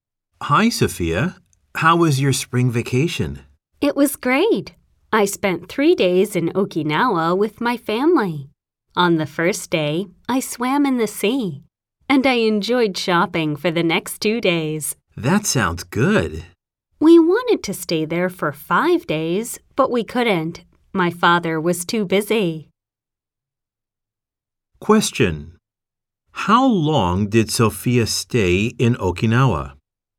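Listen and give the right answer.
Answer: 3 days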